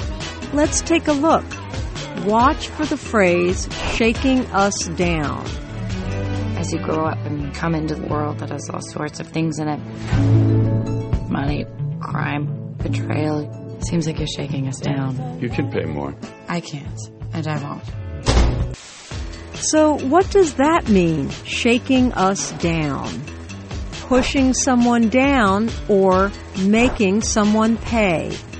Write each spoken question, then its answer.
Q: So what does that mean, shaking us down?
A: Shaking us down means making someone pay.